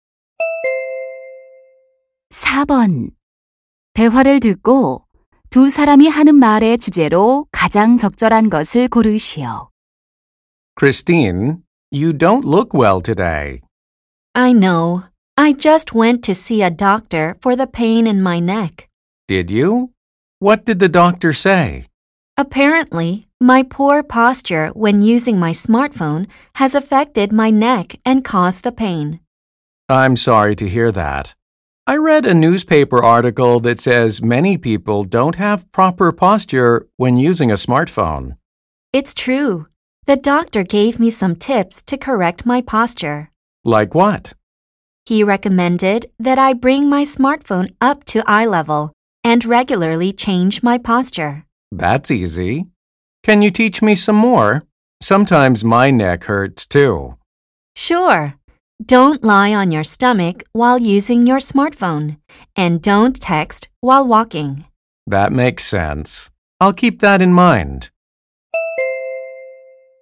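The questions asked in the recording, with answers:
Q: 대화를 듣고 두 사람이 하는 말의 주제로 가장 적절한 것을 고르시오.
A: 스마트폰 사용 시 올바른 자세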